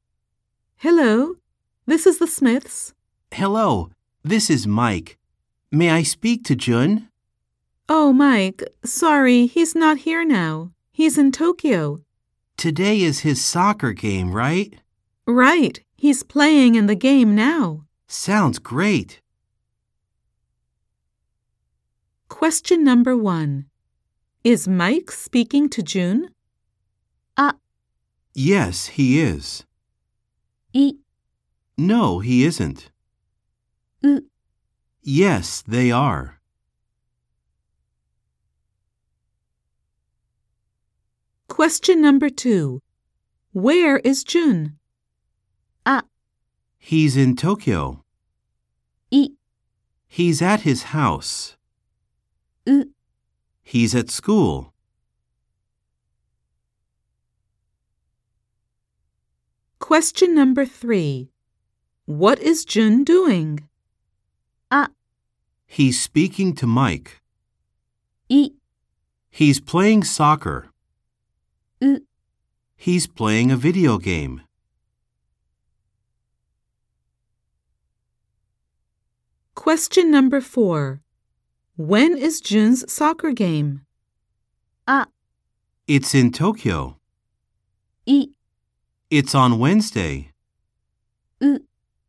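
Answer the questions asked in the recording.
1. イ: No, he isn't.
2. ア: He's in Tokyo.
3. イ: He's playing soccer.
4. ウ: It's today.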